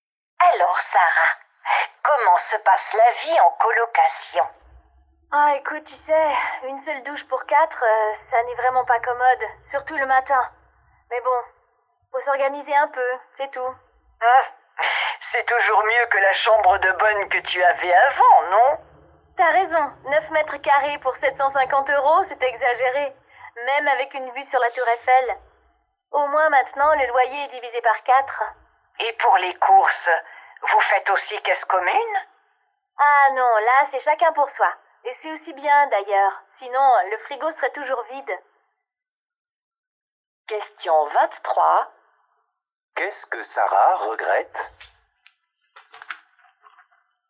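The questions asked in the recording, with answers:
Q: Qu'est-ce que Sarah regrette?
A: Il n'y a qu'une seule douche pour quatre personnes.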